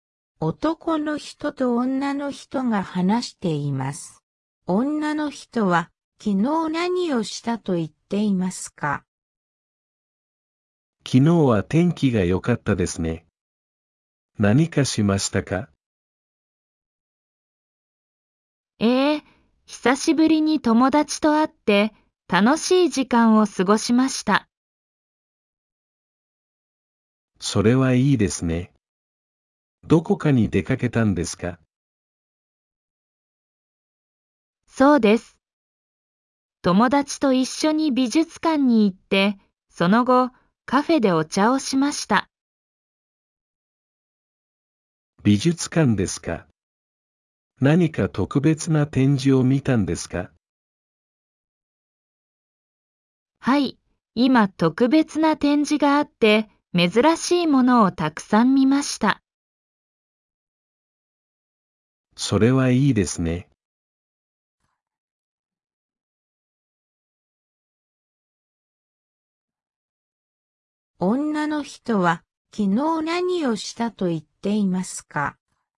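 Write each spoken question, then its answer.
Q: 女の人は昨日何をしたと言っていますか?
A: 友達と美術館に行って、その後カフェでお茶をした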